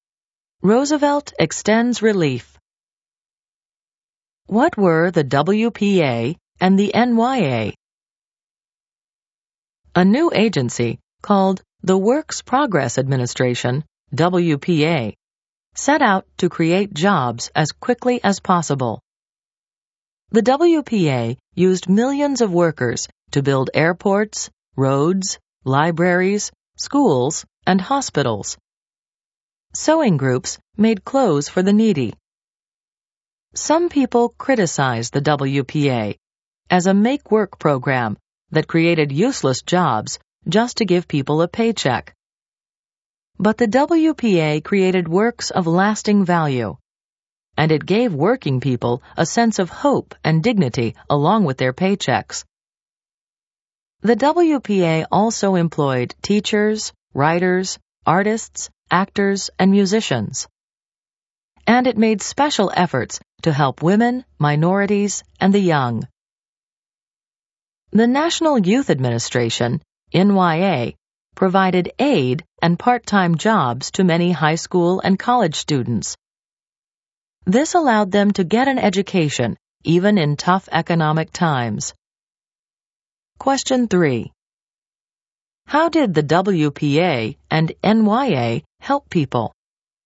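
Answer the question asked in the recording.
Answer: The WPA created jobs; the NYA gave aid and part-time jobs to students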